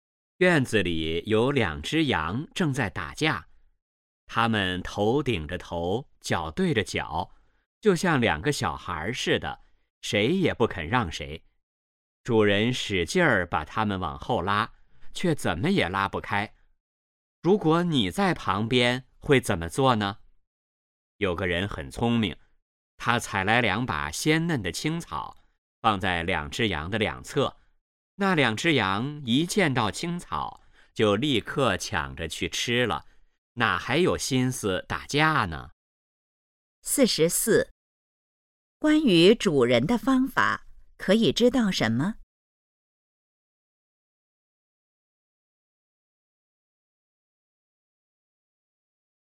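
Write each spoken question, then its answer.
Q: 那两只羊看见青草后是什么反应?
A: 立刻抢着去吃,不打架了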